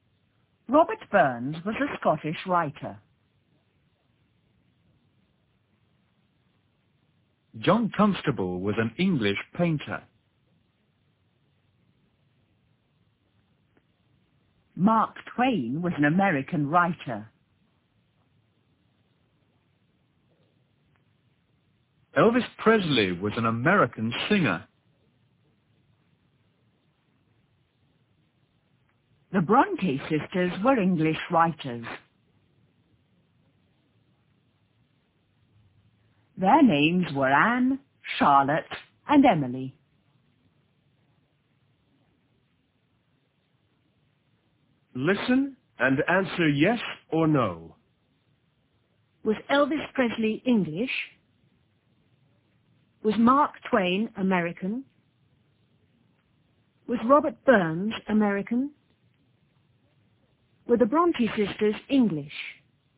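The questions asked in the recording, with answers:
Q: Was Elvis Presley English?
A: No

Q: Was Mark Twain American?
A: Yes

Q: Was Robert Burns American?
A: No

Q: Were the Bronte sisters English?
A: Yes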